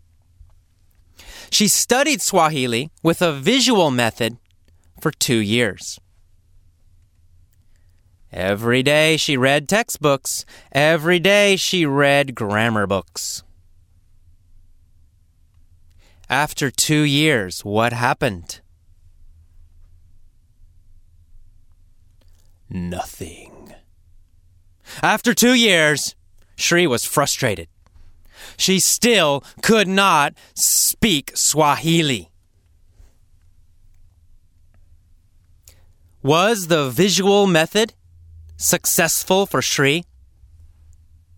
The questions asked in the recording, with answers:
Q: Was the visual method successful for Sri?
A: No. It was not successful for Sri.